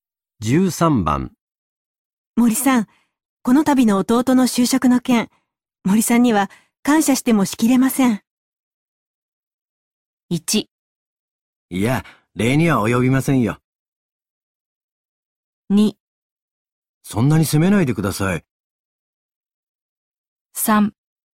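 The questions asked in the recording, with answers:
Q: 森さん、この度の弟の就職の件、森さんには感謝してもしきれません。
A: 1: いや、礼には及びませんよ。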